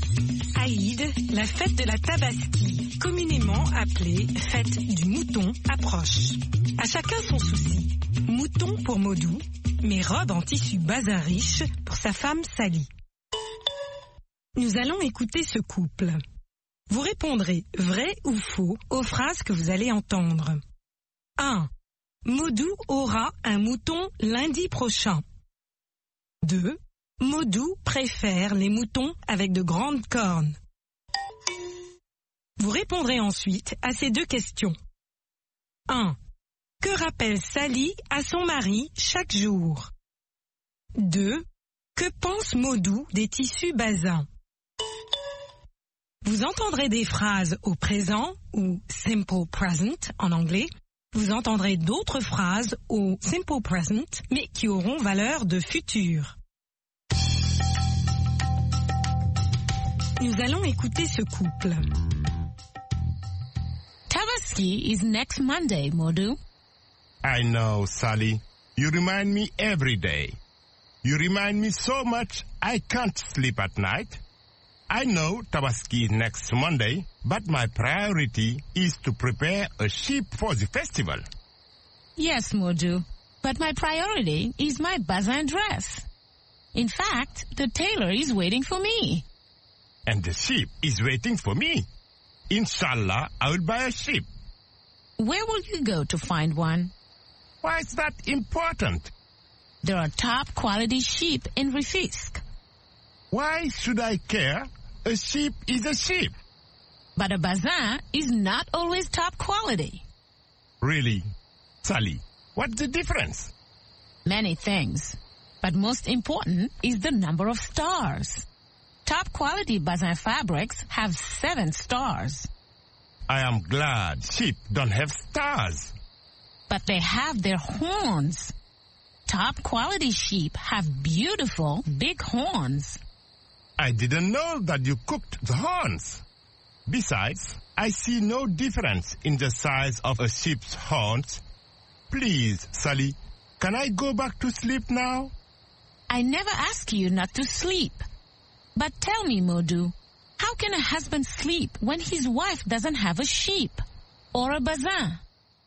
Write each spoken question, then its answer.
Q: Maudou aura un mouton lundi prochain.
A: L'énoncé 1 est vrai. Maudou aura un mouton lundi prochain.

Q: Maudou préfère les moutons avec de grandes cornes.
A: L'énoncé 2 est faux. Maudou préfère les moutons avec de grandes cornes.

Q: Que rappelle Sally à son mari chaque jour?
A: Sally rappelle chaque jour à son mari que la Tabaski est lundi prochain.